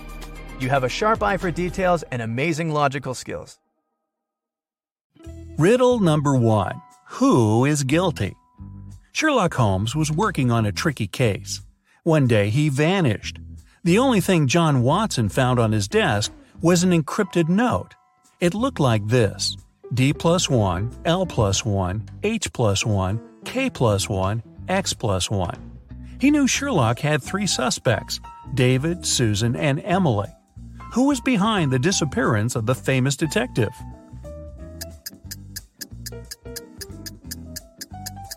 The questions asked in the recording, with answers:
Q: Who was behind the disappearance of the famous detective?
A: Emily knew where Sherlock was.